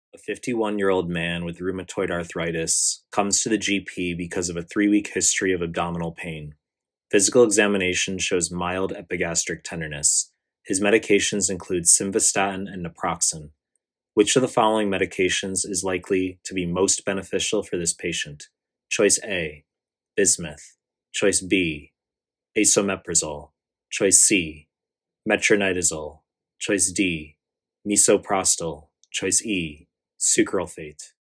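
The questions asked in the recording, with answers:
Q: Which of the following medications is likely to be most beneficial for this patient?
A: B: esomeprazole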